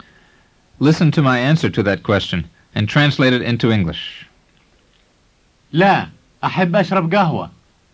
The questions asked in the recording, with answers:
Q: Listen to my answer to that question and translate it into English. لا, أحب أشرب قهوة.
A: It means, no, I would like to drink coffee.